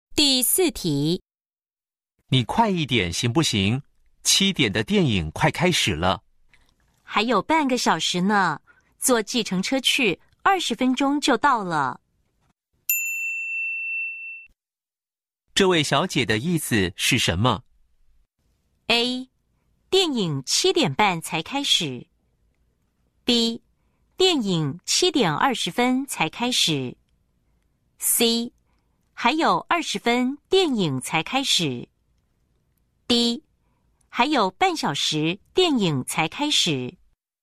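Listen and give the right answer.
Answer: D: 还有半小时电影才开始。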